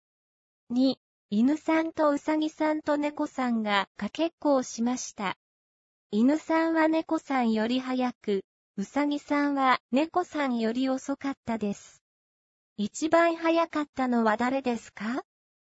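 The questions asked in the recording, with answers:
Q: 一番早かったのは誰ですか?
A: 犬さん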